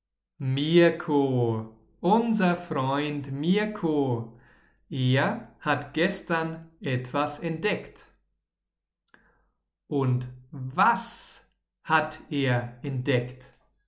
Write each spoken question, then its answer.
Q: was hat er entdeckt?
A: Eine riesige Truhe.